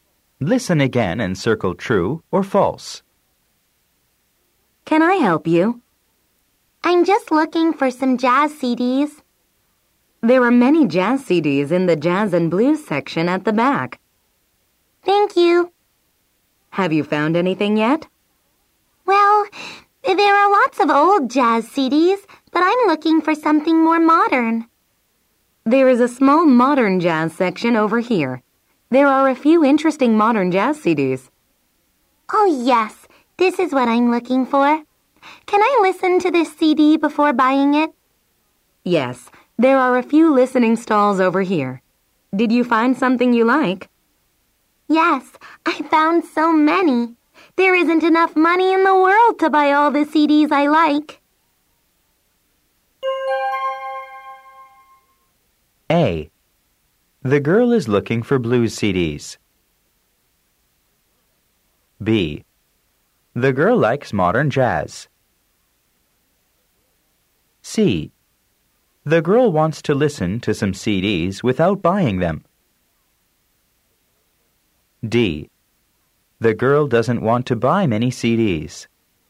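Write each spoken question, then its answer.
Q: The girl is looking for blues CDs.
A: False

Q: The girl likes modern jazz.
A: True

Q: The girl doesn't want to buy many CDs.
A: False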